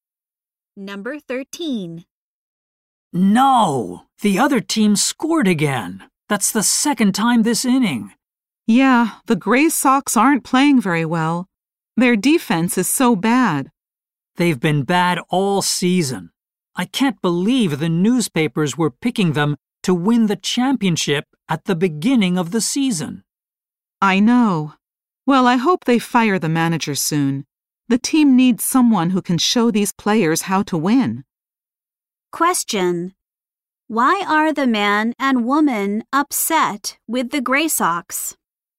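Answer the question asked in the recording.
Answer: The team has played badly all season.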